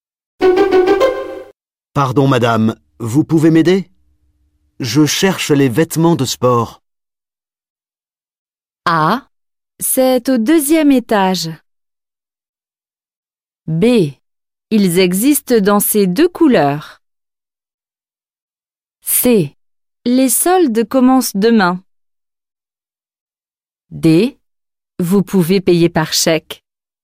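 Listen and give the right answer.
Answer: A: C'est au deuxième étage.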